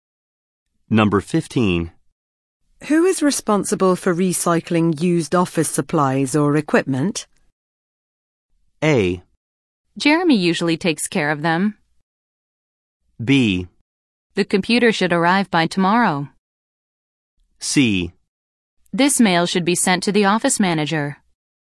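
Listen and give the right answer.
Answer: A: Jeremy usually takes care of them.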